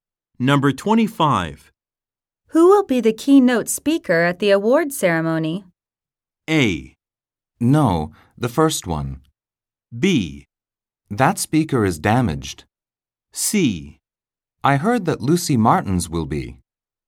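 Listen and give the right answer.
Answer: C: I heard that Lucy Martins will be.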